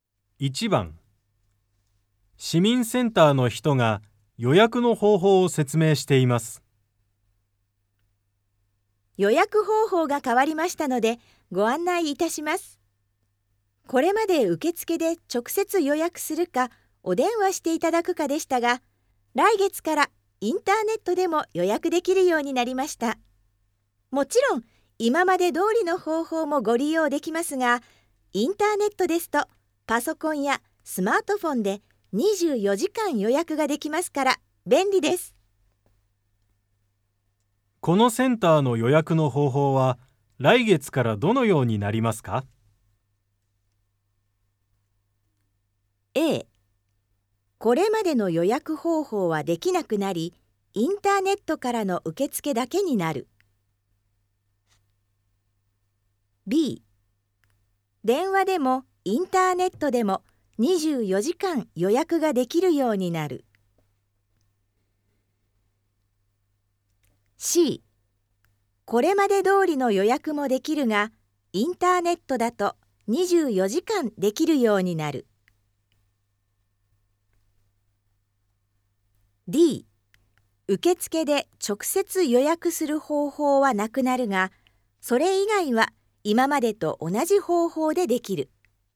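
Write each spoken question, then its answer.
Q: このセンターの予約の方法は来月からどのようになりますか?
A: C: これまで通りの予約もできるが、インターネットだと24時間できるようになる。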